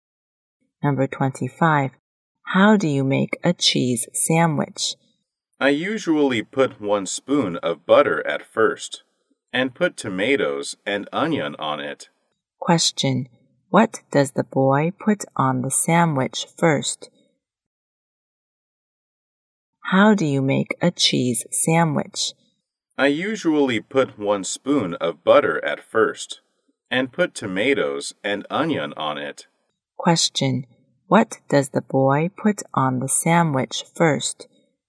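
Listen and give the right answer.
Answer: Butter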